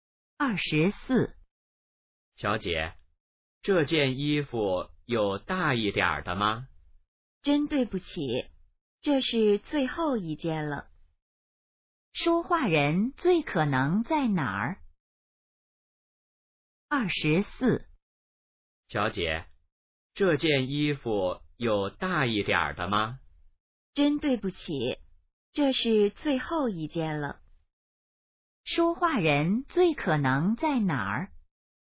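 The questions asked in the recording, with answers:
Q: 说话人最可能在哪儿?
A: 商店(买衣服)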